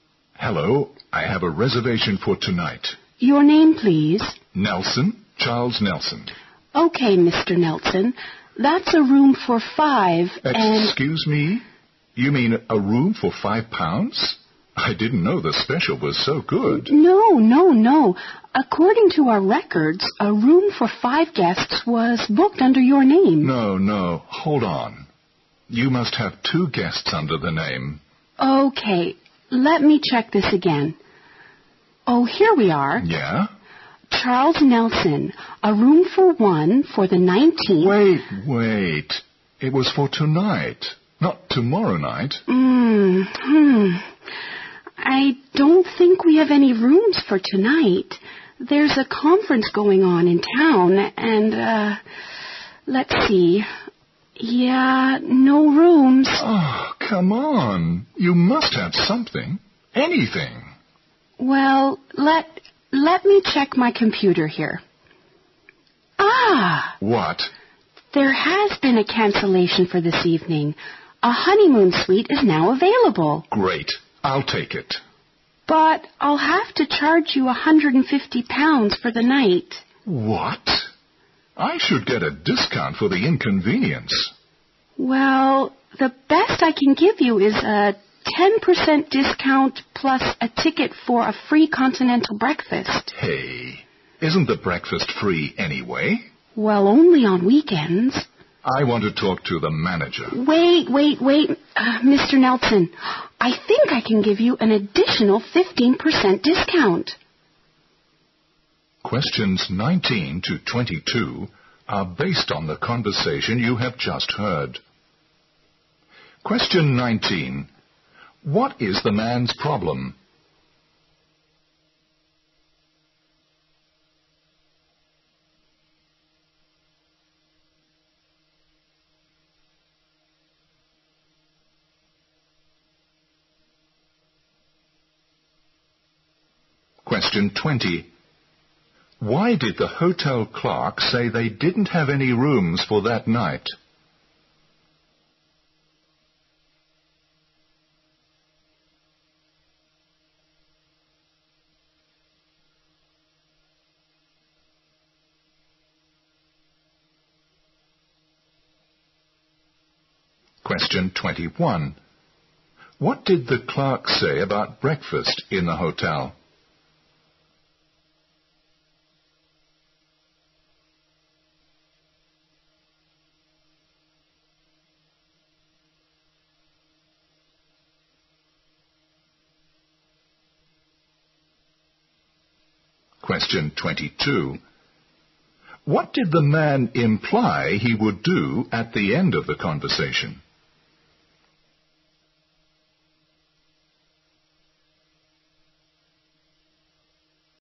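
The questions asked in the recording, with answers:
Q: What is the man's problem?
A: The hotel has his reservation wrong (booked for the wrong night)

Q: Why did the hotel clerk say they didn't have any rooms for that night?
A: Because there is a conference going on in town

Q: What did the clerk say about breakfast in the hotel?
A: It is free only on weekends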